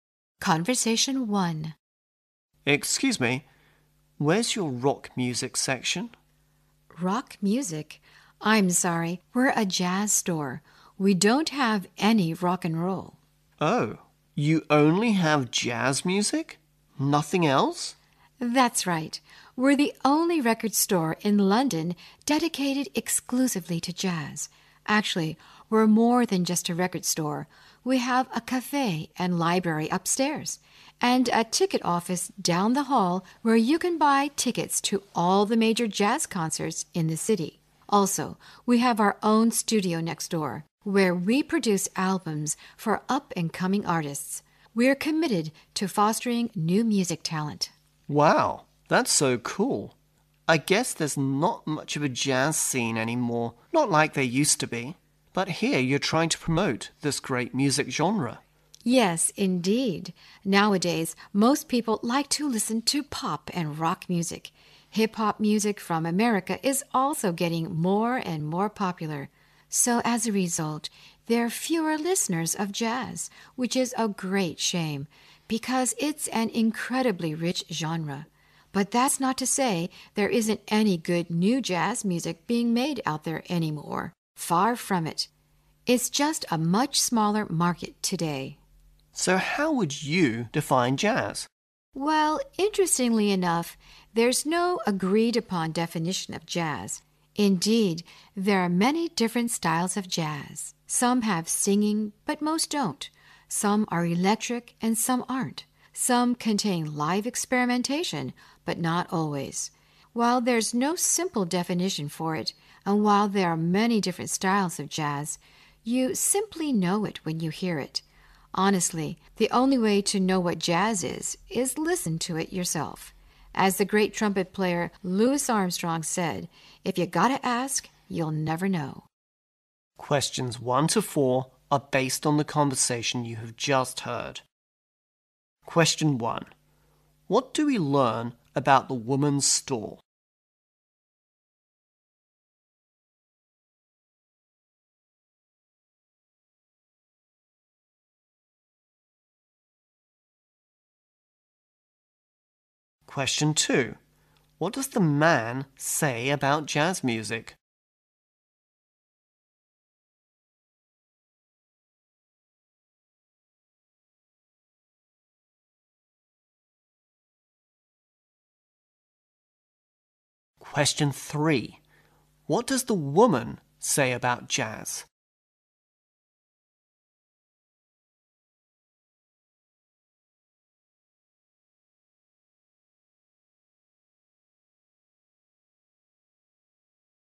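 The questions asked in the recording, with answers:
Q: What do we learn about the woman's store?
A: It sells only jazz music and also has a cafe, library, ticket office and studio.

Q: What does the man say about jazz music?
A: There isn't much of a jazz scene anymore.

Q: What does the woman say about jazz?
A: There is no agreed-upon definition of it.

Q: What should you do to appreciate different styles of jazz according to the woman?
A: Listen to it yourself.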